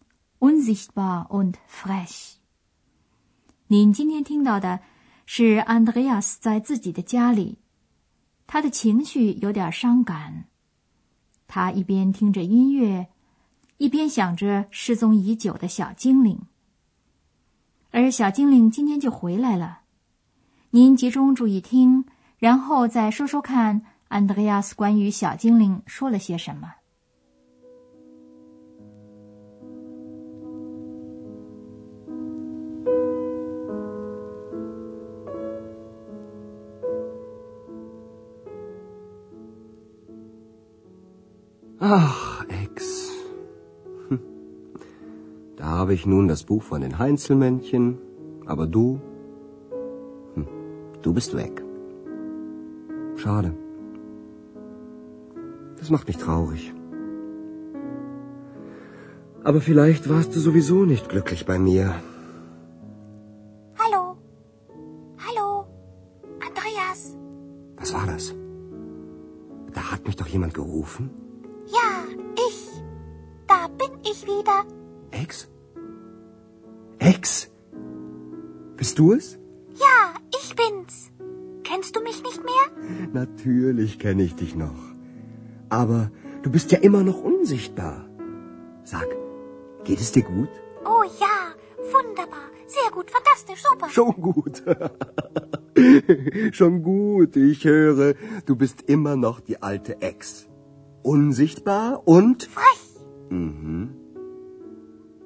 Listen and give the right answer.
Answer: Andreas 看出小精灵还是和以前一样。